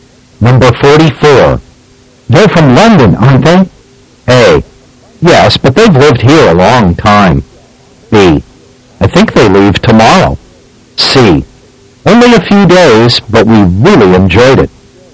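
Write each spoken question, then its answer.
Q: They're from London, aren't they?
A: A: Yes, but they've lived here a long time.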